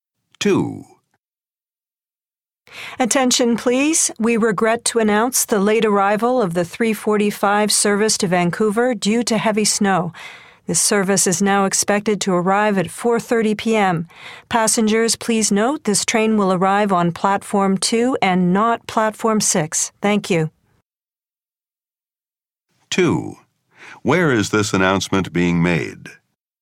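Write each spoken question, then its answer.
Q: Where is this announcement being made?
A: At a train station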